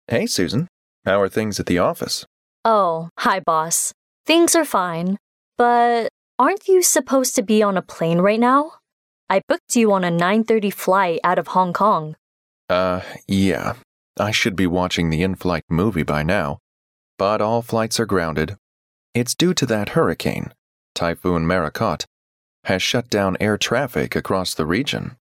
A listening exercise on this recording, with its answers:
Where is the man supposed to be at the moment?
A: On the 9:30 flight.

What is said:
M: Hey, Susan, how are things at the office?
W: Oh, hi boss. Things are fine. But...aren't you supposed to be on a plane right now? I booked you a 9:30 flight out of Hong Kong.
Yeah. I should be watching the in-flight movie by now, but all flights are grounded. It's due to that hurricane Typhoon Marokot has shut down air traffic across the region.